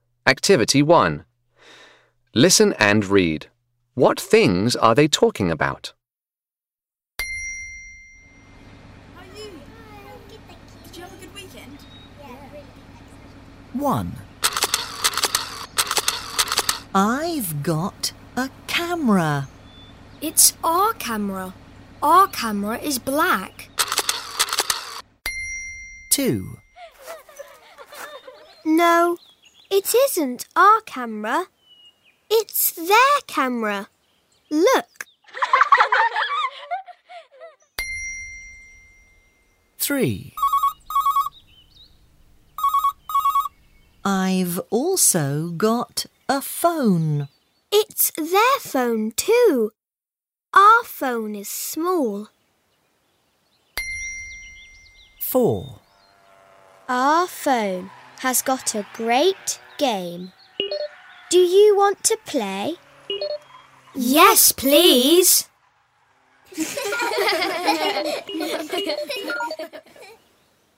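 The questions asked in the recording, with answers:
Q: What things are they talking about?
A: A camera and a phone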